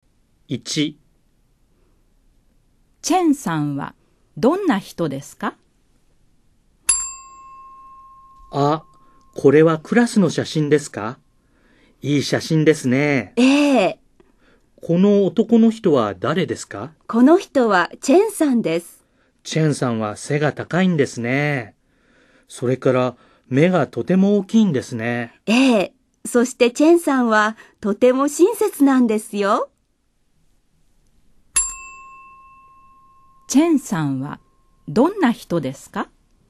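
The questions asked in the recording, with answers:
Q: チェンさんはどんな人ですか?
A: 背が高くて、目がとても大きくて、とても親切な人です。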